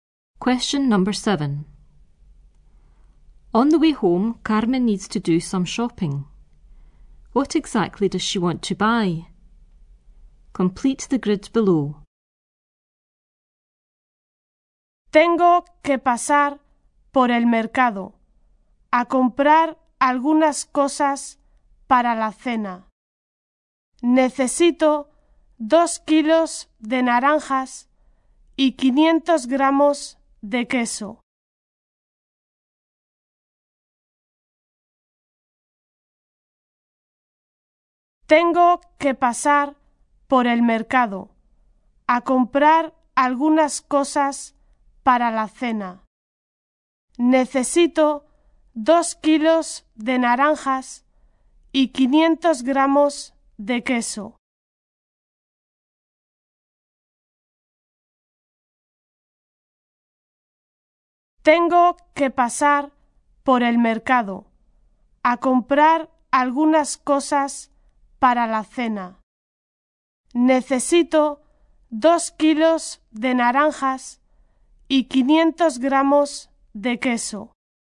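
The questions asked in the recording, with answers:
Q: What exactly does she want to buy?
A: 2 kilos of oranges and 500 grams of cheese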